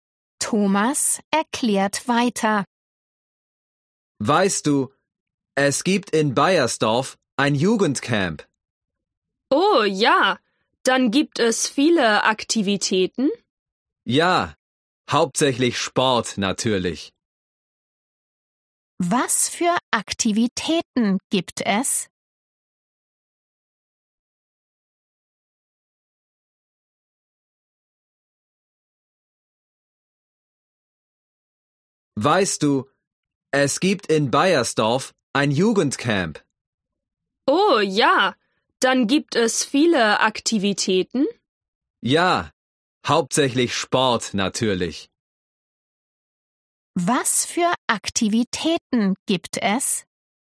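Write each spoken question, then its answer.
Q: Was für Aktivitäten gibt es?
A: Hauptsächlich Sport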